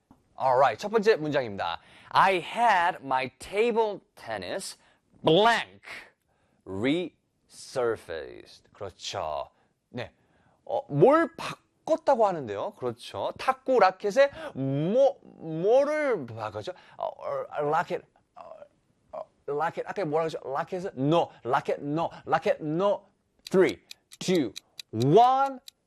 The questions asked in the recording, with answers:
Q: I had my table tennis blank resurfaced.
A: Paddle.